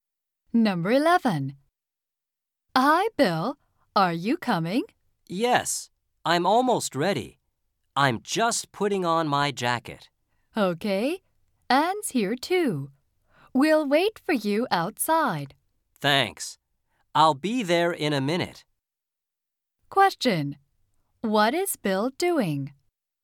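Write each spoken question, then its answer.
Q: What is Bill doing?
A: Putting on his jacket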